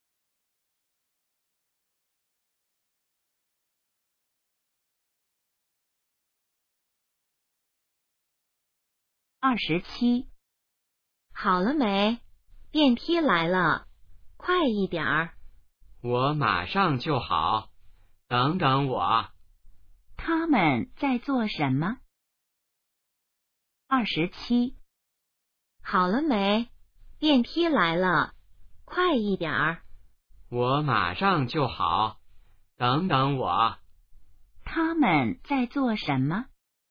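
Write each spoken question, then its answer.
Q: 他们在做什么?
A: 等电梯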